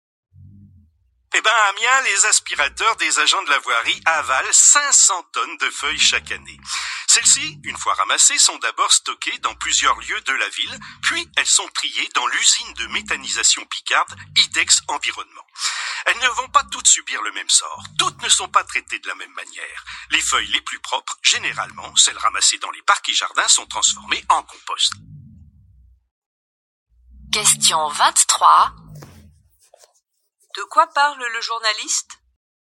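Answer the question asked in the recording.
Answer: Du ramassage et du traitement des feuilles mortes à Amiens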